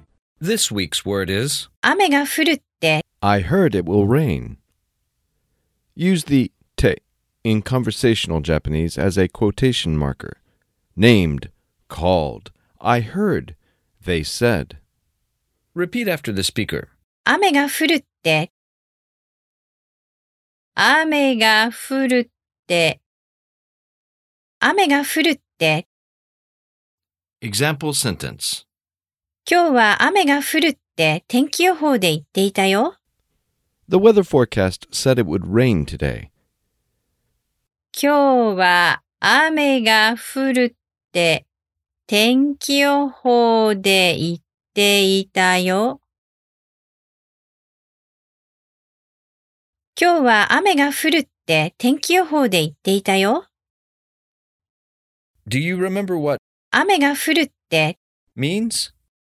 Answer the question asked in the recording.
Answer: Informal quotation marker.